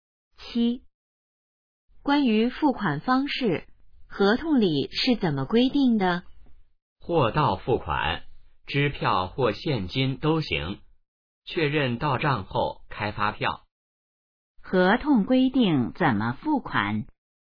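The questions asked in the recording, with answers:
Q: 合同规定怎么付款?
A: 货到付款,支票或现金都行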